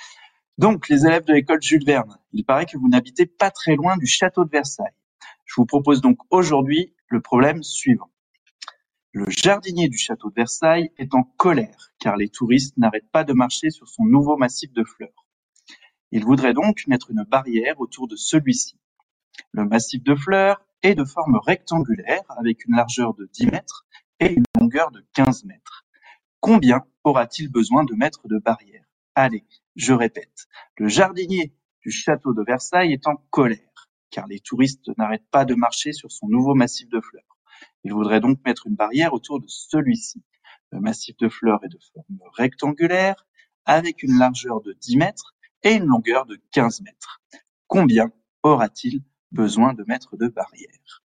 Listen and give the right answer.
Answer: On a trouvé 50.